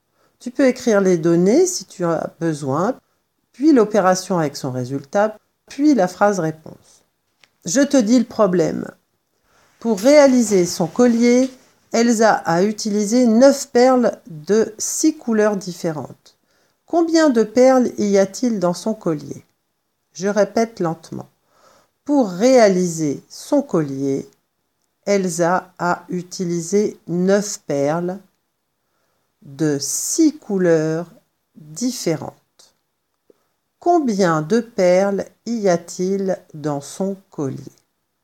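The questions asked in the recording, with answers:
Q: Combien de perles y a-t-il dans son collier?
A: 54 perles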